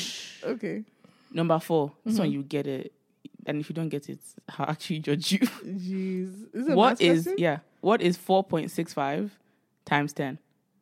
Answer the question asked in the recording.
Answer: 46.5? Yeah.